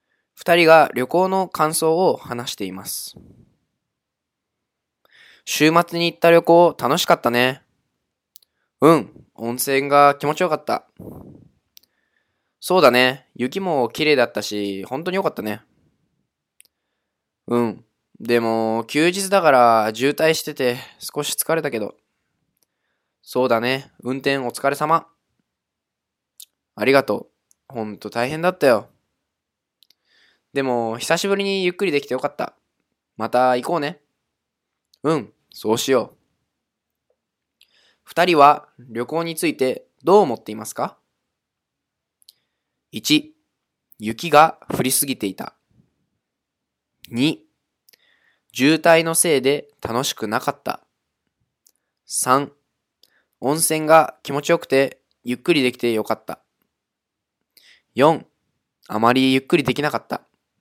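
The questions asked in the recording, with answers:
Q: 二人は旅行についてどう思っていますか?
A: 3: 温泉が気持ちよくてゆっくりできてよかった。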